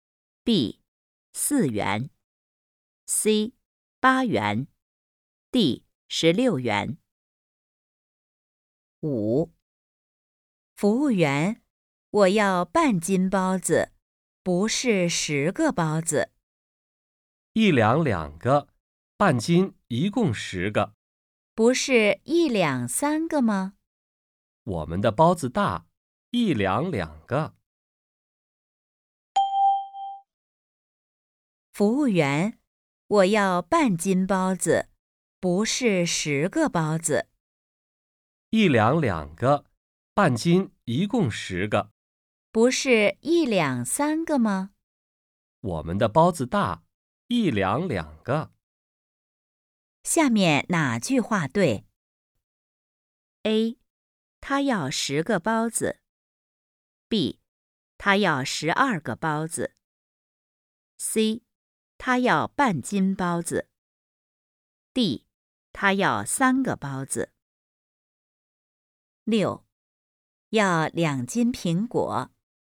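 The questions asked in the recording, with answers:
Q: 下面哪句话对?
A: C: 他要半斤包子。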